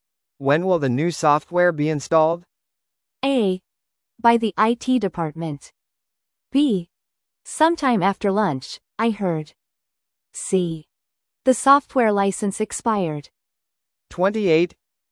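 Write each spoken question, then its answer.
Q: When will the new software be installed?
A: B: Sometime after lunch, I heard.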